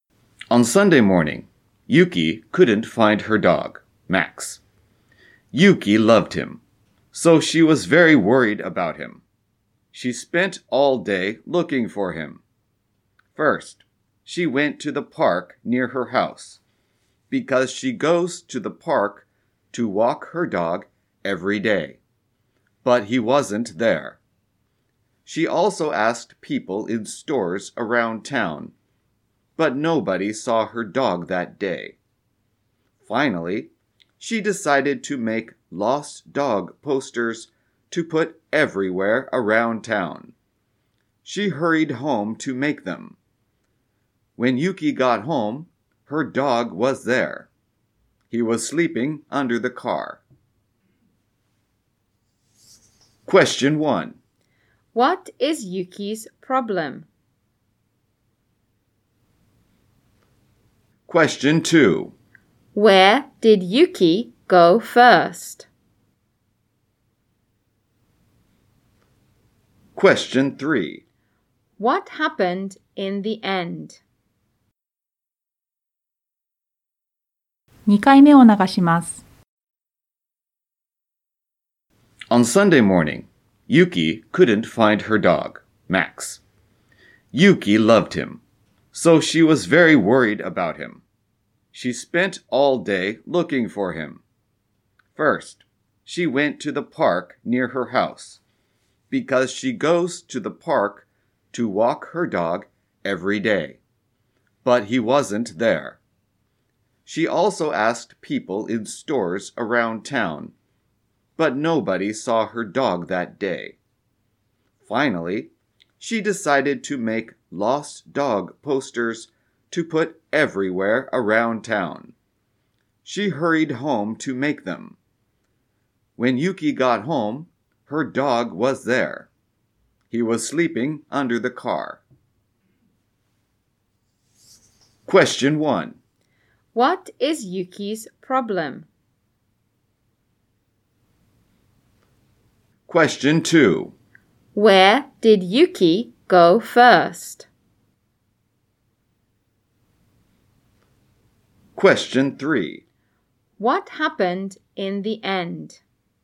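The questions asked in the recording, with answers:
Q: What is Yuki's problem?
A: She couldn't find her dog, Max.

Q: Where did Yuki go first?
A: To the park near her house.

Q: What happened in the end?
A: When she got home, her dog was there, sleeping under the car.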